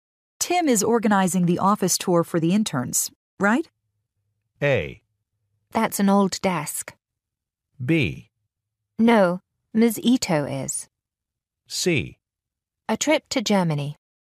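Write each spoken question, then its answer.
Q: Tim is organizing the office tour for the interns, right?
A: B: No, Ms. Ito is.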